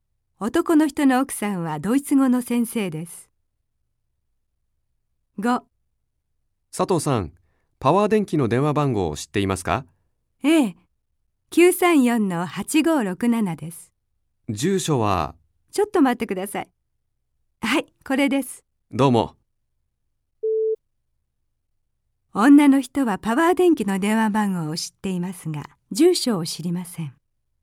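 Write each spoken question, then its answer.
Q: 女の人はパワー電気の電話番号を知っていますが、住所を知りません。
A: 正しくない(×)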